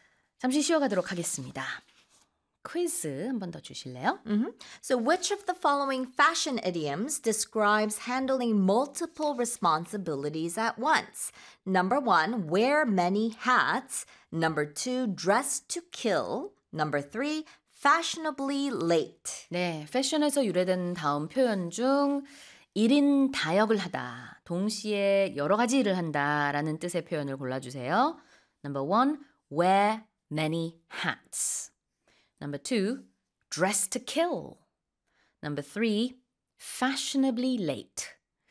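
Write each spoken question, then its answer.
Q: So which of the following fashion idioms describes handling multiple responsibilities at once?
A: 1: wear many hats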